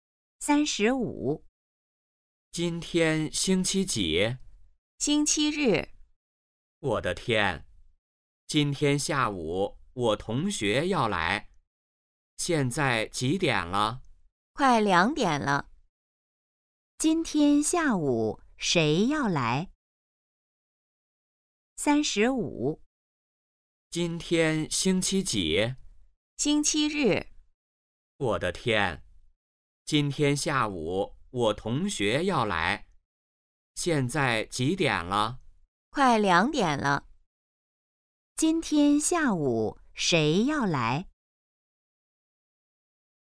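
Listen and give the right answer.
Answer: 说话人的同学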